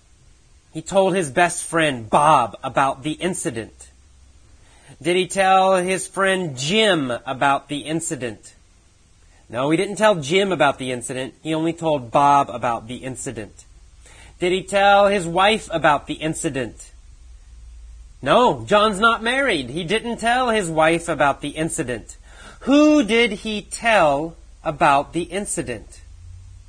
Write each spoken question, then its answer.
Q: Who did he tell about the incident?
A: He told Bob about the incident.